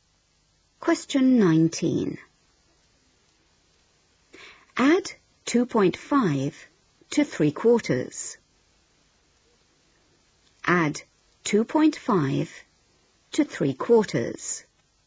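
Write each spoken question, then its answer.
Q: Add 2.5 to 3/4.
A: 3.25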